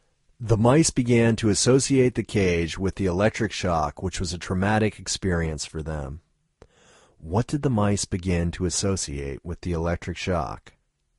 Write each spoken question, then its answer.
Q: What did the mice begin to associate with the electric shock?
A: The mice began to associate the cage with the electric shock.